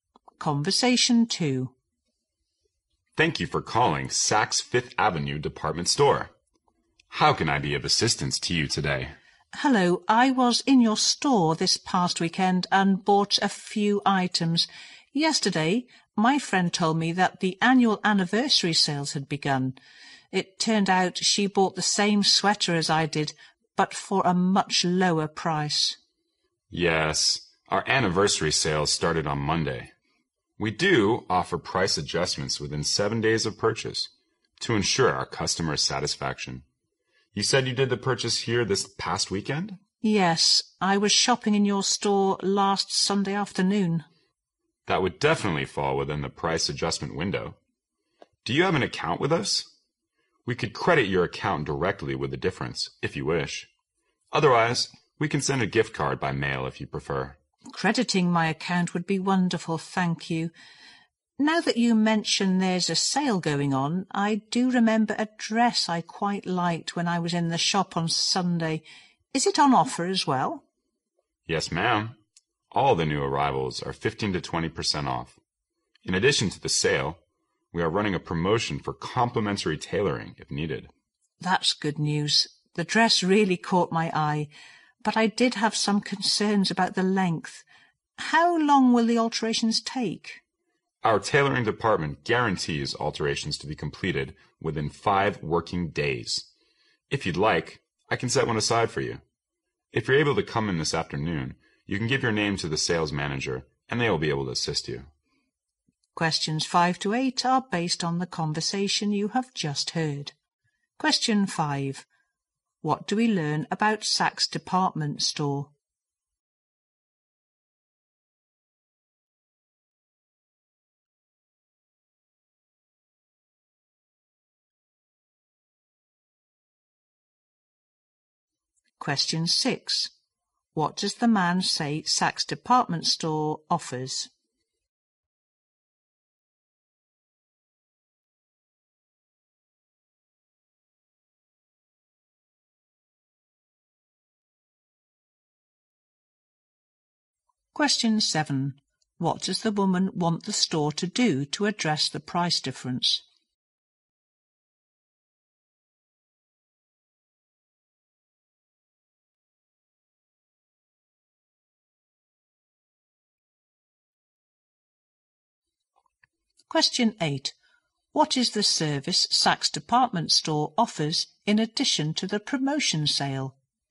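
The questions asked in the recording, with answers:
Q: What does the man say Saks Department Store offers?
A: Price adjustments within 7 days of purchase

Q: What does the woman want the store to do to address the price difference?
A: Credit her account with the difference

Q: What is the service Saks Department Store offers in addition to the promotion sale?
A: Free tailoring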